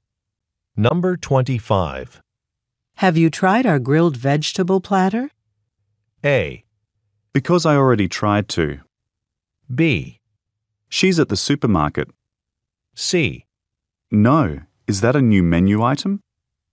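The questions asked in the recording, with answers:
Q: Have you tried our grilled vegetable platter?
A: C: No, is that a new menu item?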